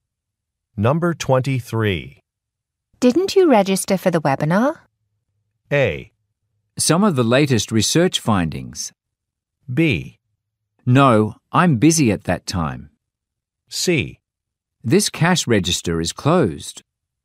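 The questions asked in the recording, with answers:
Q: Didn't you register for the webinar?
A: B: No, I'm busy at that time.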